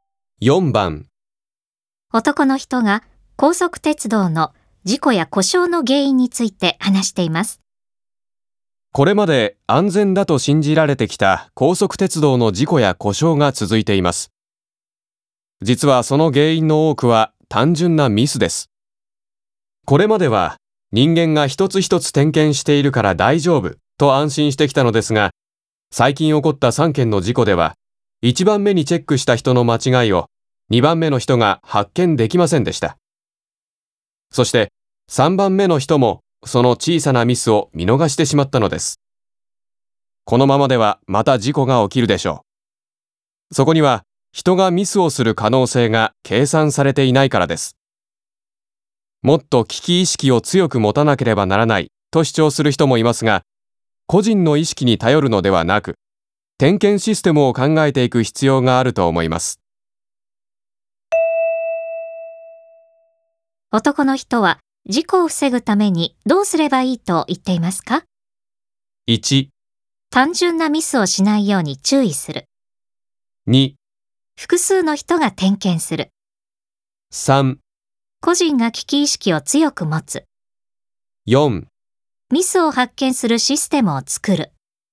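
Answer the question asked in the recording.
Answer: 4: ミスを発見するシステムを作る。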